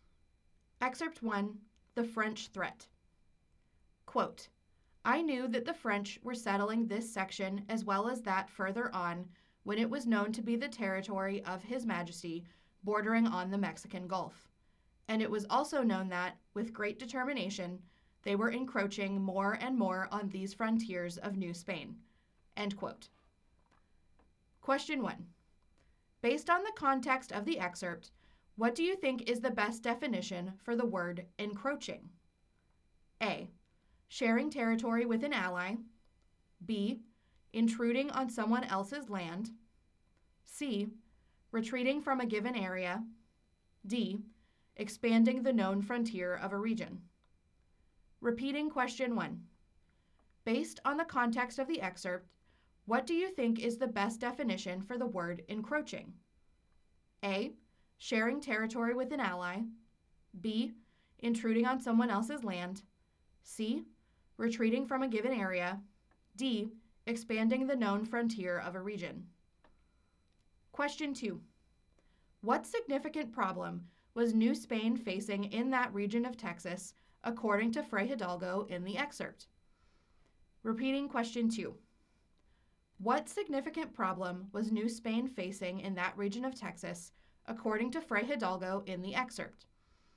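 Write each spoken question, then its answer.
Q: Based on the context of the excerpt, what do you think is the best definition for the word encroaching?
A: B: Intruding on someone else's land.

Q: What significant problem was New Spain facing in that region of Texas according to Fray Hidalgo in the excerpt.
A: The French were settling and encroaching on its frontiers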